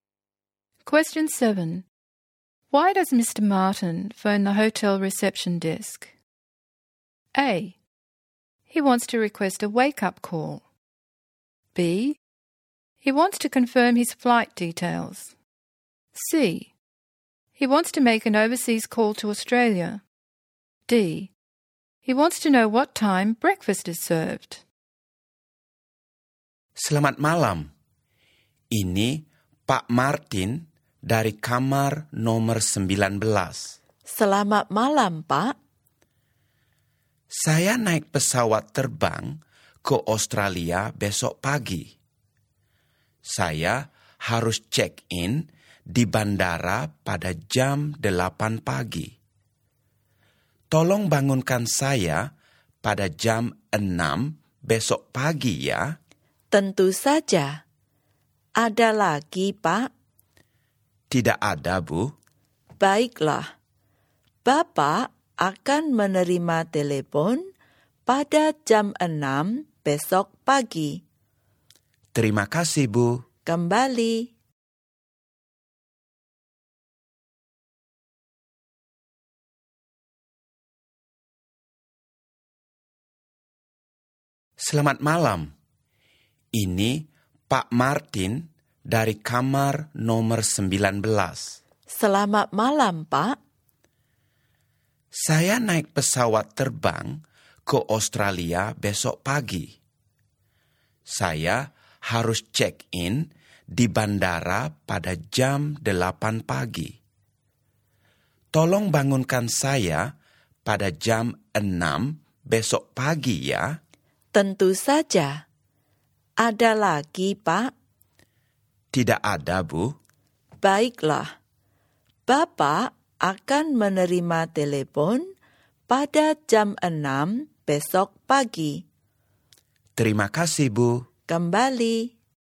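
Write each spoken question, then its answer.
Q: Why does Mr. Martin phone the hotel reception desk?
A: A: He wants to request a wake-up call.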